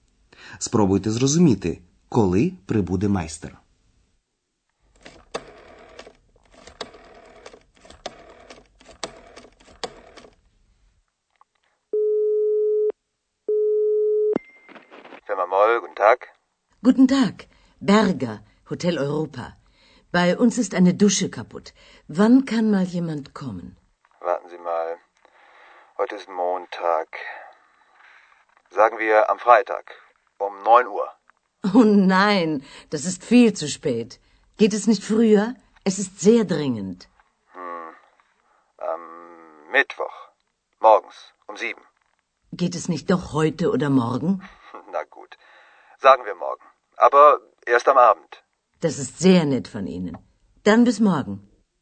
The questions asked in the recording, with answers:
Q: Спробуйте зрозуміти, коли прибуде майстер.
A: Отже, майстер прийде наступного дня увечері.